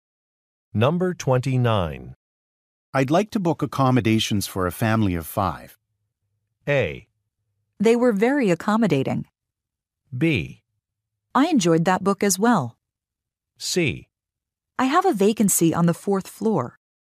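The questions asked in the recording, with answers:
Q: I'd like to book accommodations for a family of five.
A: C: I have a vacancy on the fourth floor.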